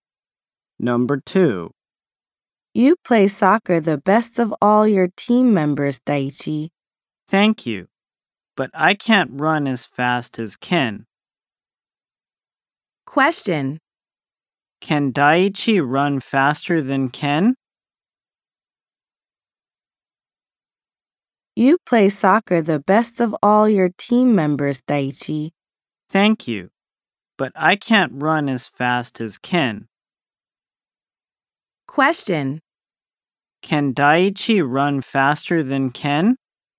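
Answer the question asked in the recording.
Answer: No, he can't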